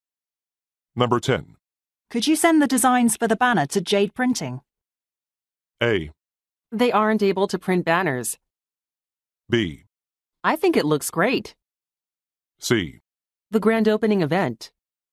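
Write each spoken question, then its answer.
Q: Could you send the designs for the banner to Jade Printing?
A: A: They aren't able to print banners.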